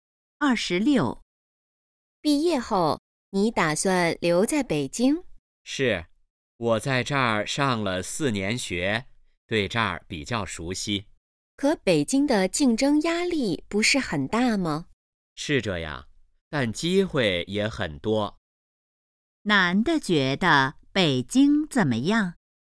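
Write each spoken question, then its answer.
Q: 男的觉得北京怎么样?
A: 机会很多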